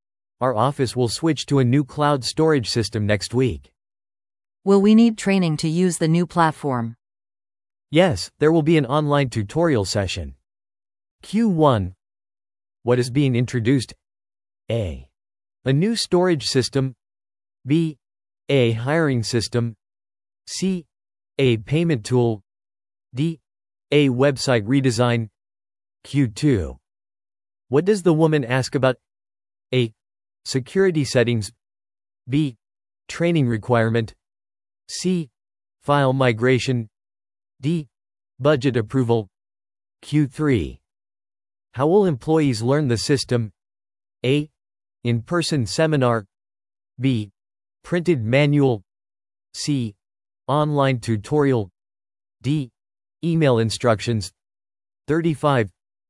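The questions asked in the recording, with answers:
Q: What is being introduced?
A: A: A new storage system.

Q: What does the woman ask about?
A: B: Training requirement.

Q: How will employees learn the system?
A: C: Online tutorial.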